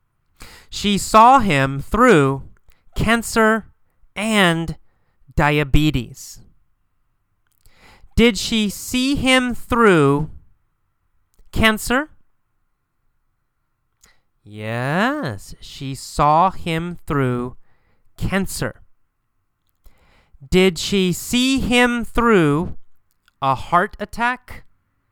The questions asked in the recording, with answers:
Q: Did she see him through a heart attack?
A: No. Not a heart attack. She didn't see him through a heart attack.